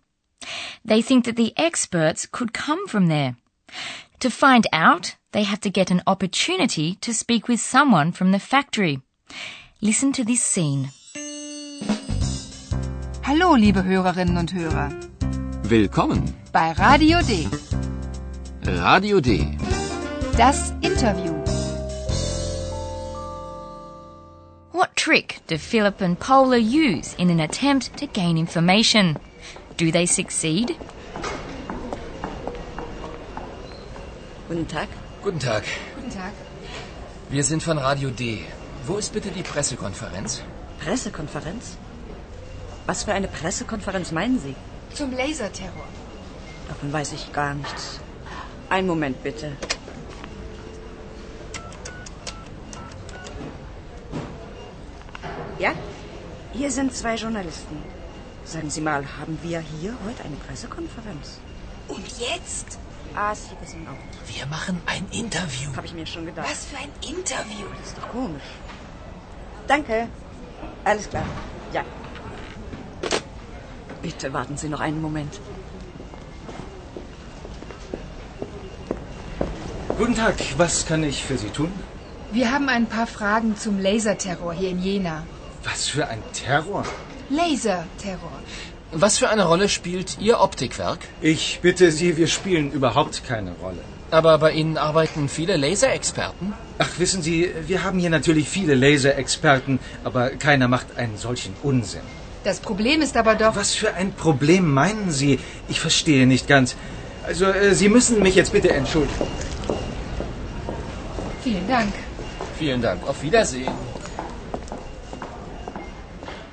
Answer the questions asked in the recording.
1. They go into the optics factory and pretend that a press conference has been announced.
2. But they unfortunately didn't get any more precise information